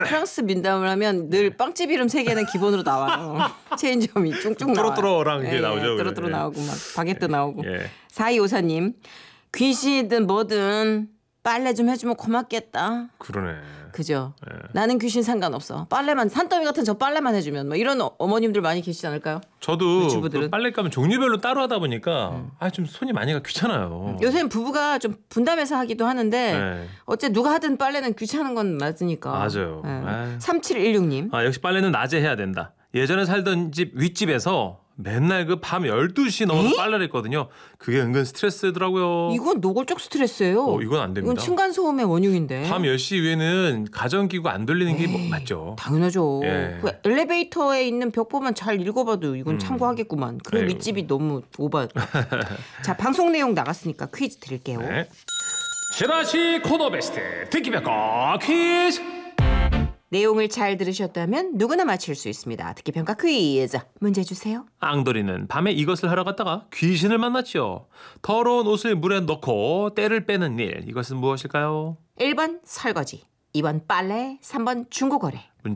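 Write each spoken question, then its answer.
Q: 더러운 옷을 물에 넣고 때를 빼는 일. 이것은 무엇일까요?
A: 2번: 빨래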